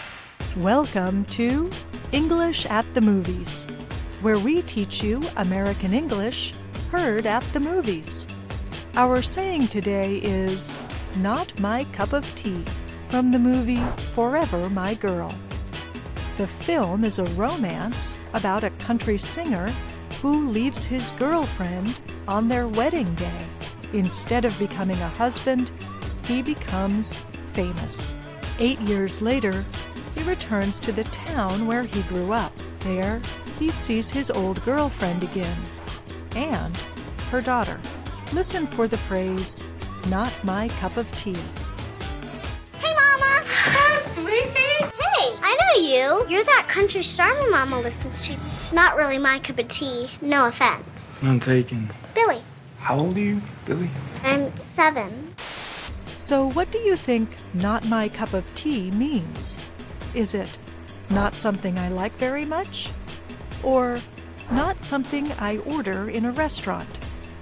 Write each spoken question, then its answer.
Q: So what do you think not my cup of tea means?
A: Not my cup of tea means not something I like very much.